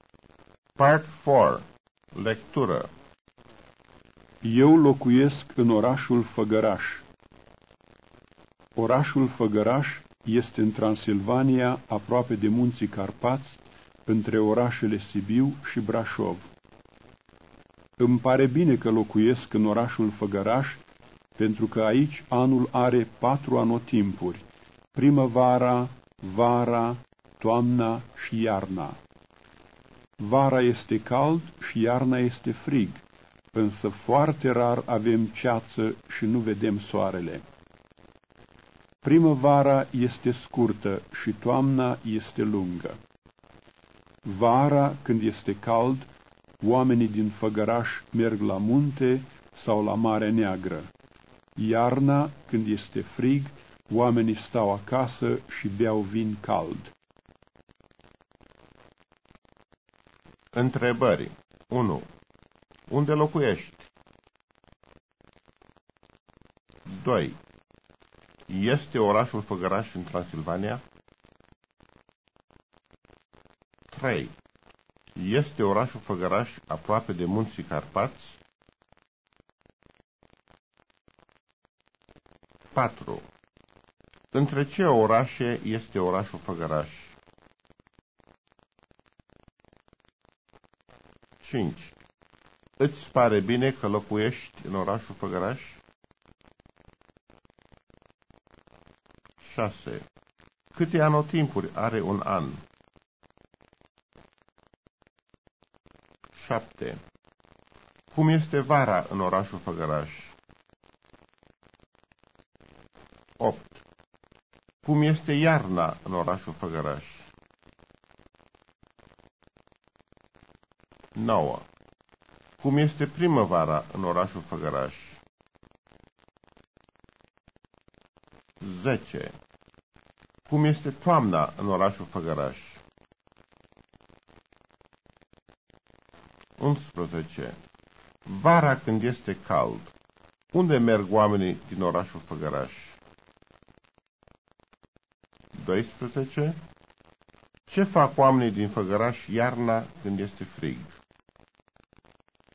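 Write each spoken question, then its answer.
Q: Este orașul Făgăraș în Transilvania?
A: Da, orașul Făgăraș este în Transilvania.

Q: Este orașul Făgăraș aproape de munții Carpați?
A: Da, este aproape de munții Carpați.

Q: Între ce orașe este orașul Făgăraș?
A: Între orașele Sibiu și Brașov.

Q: Câte anotimpuri are un an?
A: Patru: primăvara, vara, toamna și iarna.

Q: Cum este vara în orașul Făgăraș?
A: Vara este cald.

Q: Cum este iarna în orașul Făgăraș?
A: Iarna este frig.

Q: Cum este primăvara în orașul Făgăraș?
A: Primăvara este scurtă.

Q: Cum este toamna în orașul Făgăraș?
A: Toamna este lungă.

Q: Vara când este cald, unde merg oamenii din orașul Făgăraș?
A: La munte sau la Marea Neagră.

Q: Ce fac oamenii din Făgăraș iarna când este frig?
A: Stau acasă și beau vin cald.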